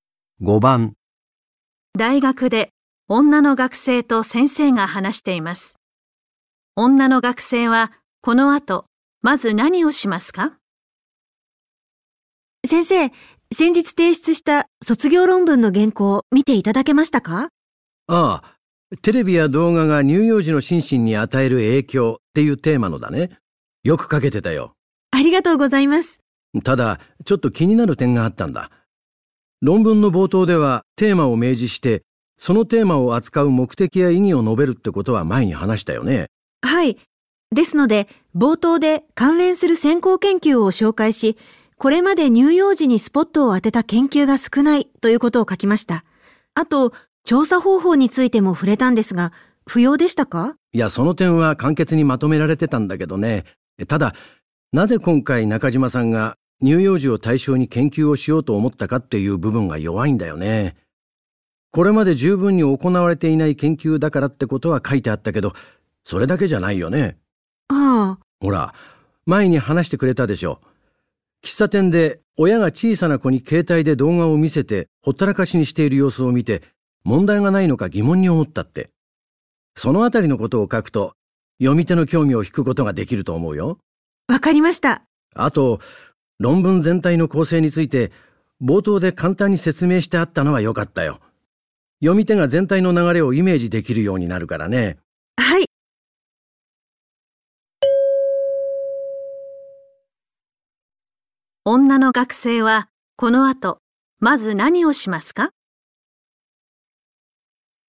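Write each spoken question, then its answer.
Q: 女の学生はこの後まず何をしますか?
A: 論文の冒頭に、乳幼児を対象に研究しようと思った理由(喫茶店で見た親子の様子)を書き加える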